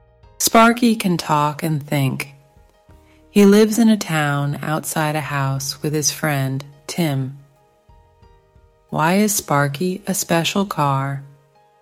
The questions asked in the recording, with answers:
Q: Why is Sparky a special car?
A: Because he can talk and think.